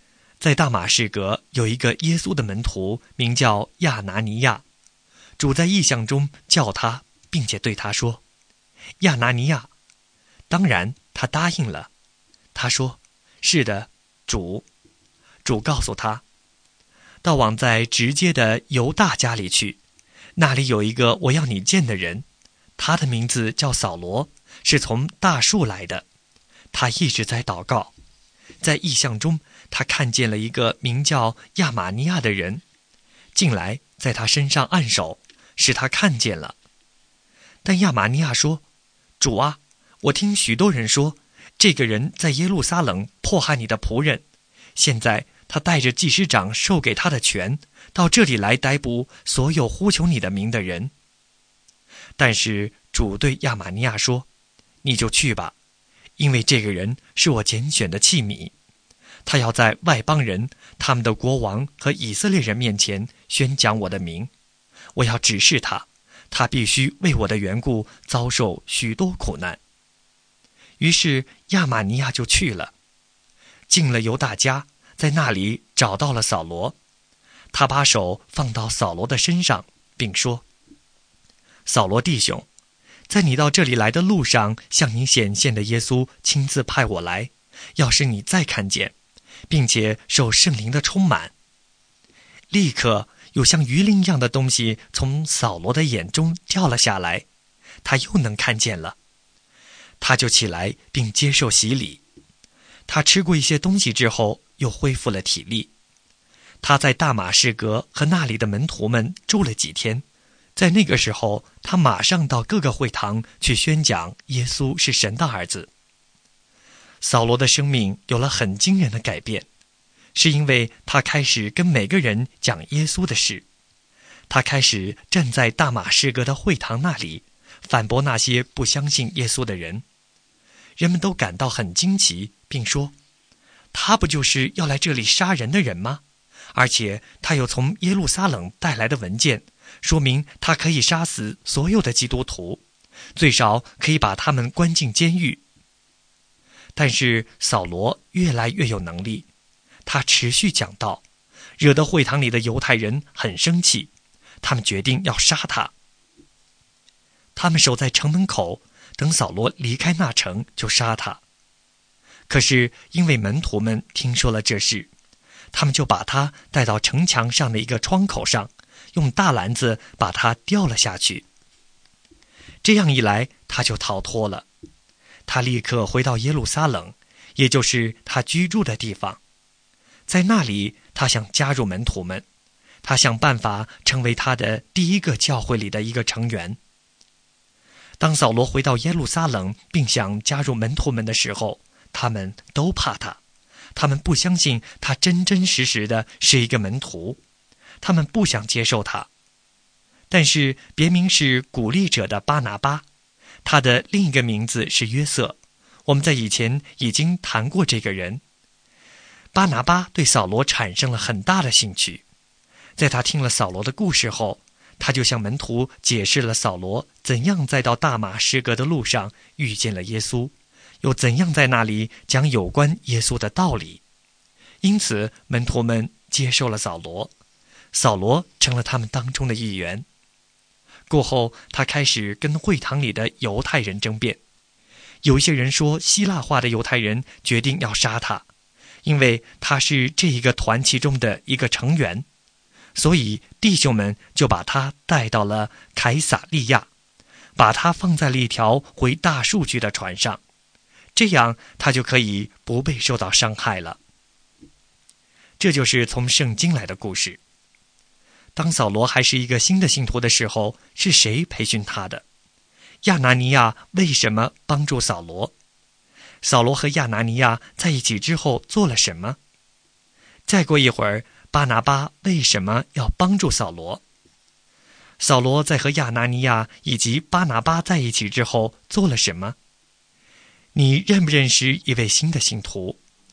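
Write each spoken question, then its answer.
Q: 当扫罗还是一个新的信徒的时候,是谁培训他的?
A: 亚拿尼亚和巴拿巴

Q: 亚拿尼亚为什么帮助扫罗?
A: 因为主在异象中叫他去,扫罗是主拣选的器皿

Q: 扫罗和亚拿尼亚在一起之后做了什么?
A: 受洗,并到会堂宣讲耶稣是神的儿子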